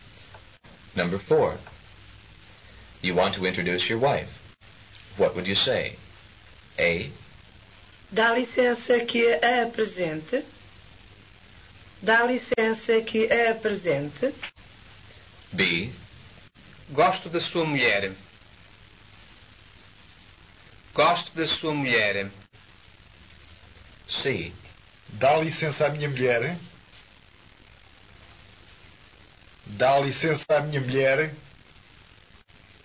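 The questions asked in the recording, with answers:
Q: You want to introduce your wife.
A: A: Dá licença que a apresente.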